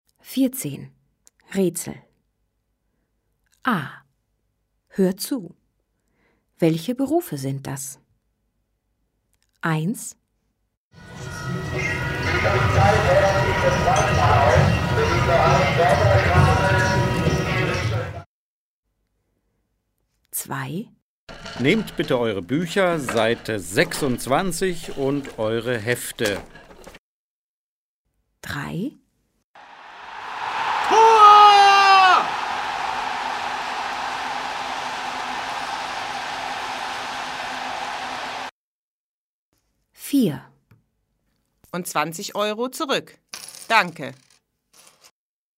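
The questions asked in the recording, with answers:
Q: Welche Berufe sind das?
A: Lehrer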